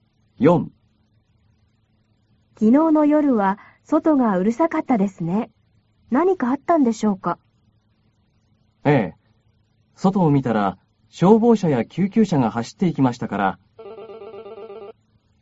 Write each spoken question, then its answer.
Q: 昨日の夜は外がうるさかったですね。何かあったんでしょうか?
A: どこかで火事があったようですよ。